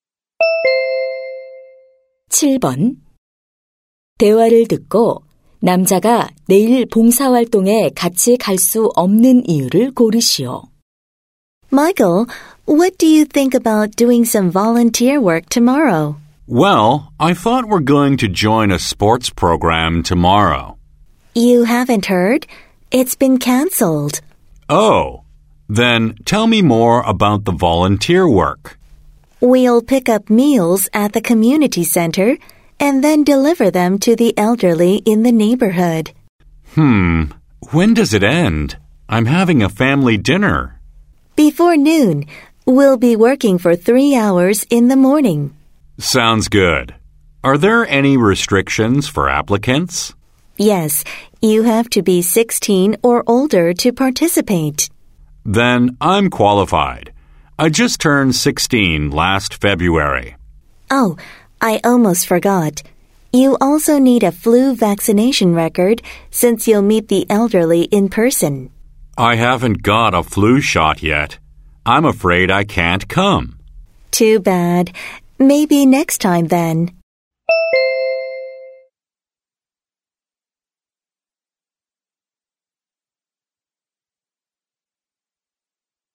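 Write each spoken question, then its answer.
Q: 대화를 듣고 남자가 내일 봉사활동에 같이 갈 수 없는 이유를 고르시오.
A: 독감 예방 접종을 아직 맞지 않아서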